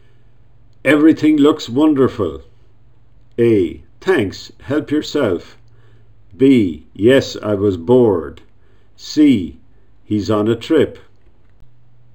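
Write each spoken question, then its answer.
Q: Everything looks wonderful.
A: A: Thanks, help yourself.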